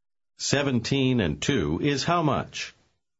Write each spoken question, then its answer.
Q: 17 and 2 is how much?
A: 19.